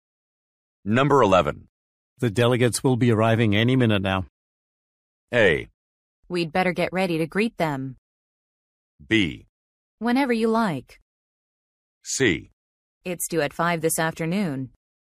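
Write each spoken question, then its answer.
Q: The delegates will be arriving any minute now.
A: A: We'd better get ready to greet them.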